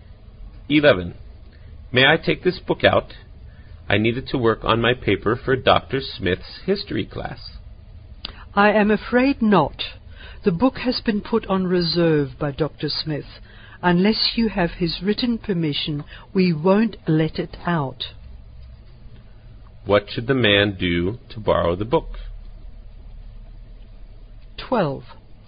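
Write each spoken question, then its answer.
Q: What should the man do to borrow the book?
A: Get Dr. Smith's written permission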